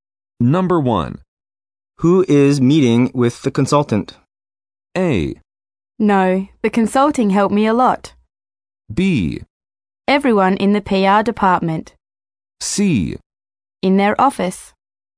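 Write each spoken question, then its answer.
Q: Who is meeting with the consultant?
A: B: Everyone in the PR department.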